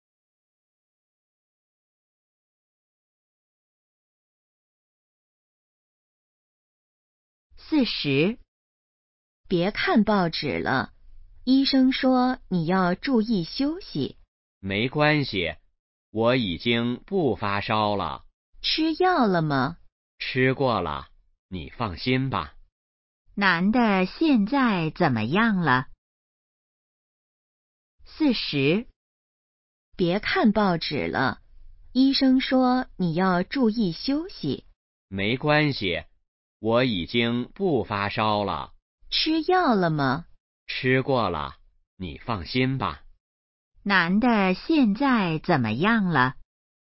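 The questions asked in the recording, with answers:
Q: 男的现在怎么样了?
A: 已经不发烧了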